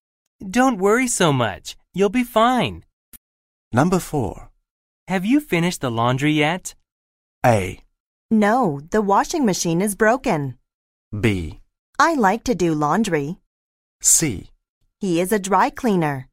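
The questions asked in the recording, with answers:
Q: Have you finished the laundry yet?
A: A: No, the washing machine is broken.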